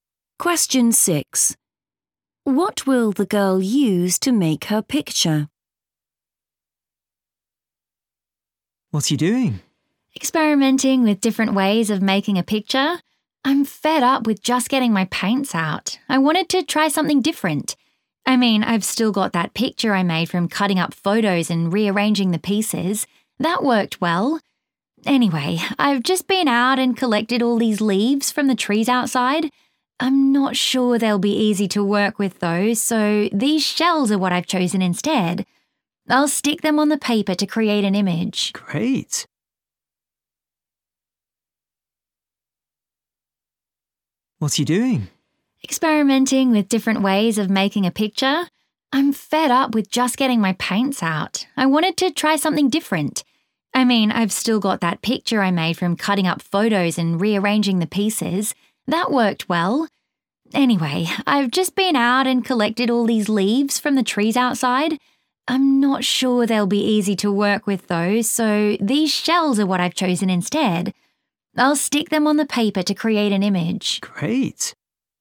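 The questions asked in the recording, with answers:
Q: What will the girl use to make her picture?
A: shells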